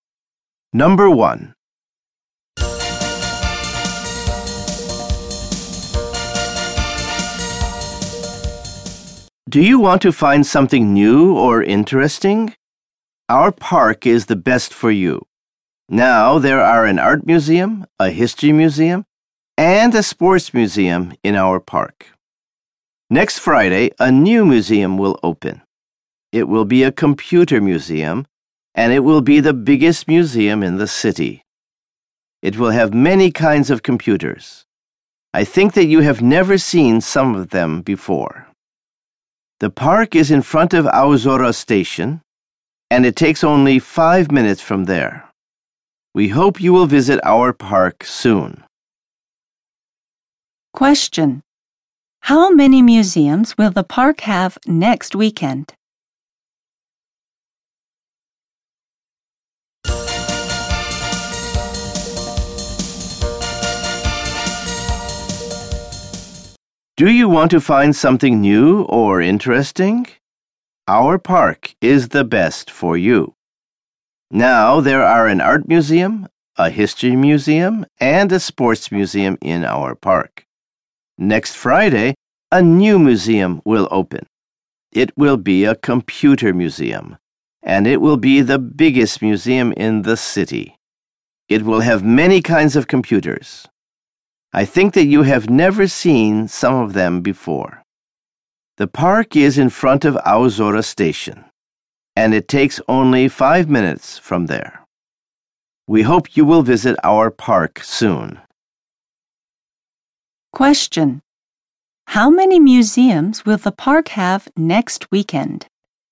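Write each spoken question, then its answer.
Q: How many museums will the park have next weekend?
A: Four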